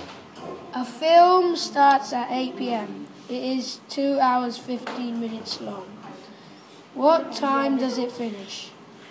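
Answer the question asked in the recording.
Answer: 10:15 p.m.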